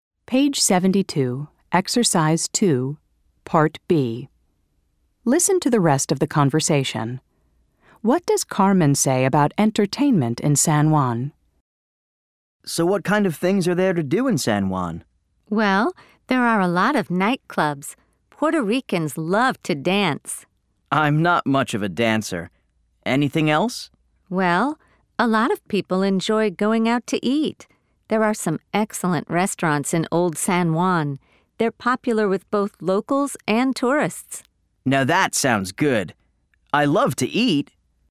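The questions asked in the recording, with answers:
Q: What does Carmen say about entertainment in San Juan?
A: There are a lot of nightclubs (Puerto Ricans love to dance) and excellent restaurants in Old San Juan, popular with locals and tourists.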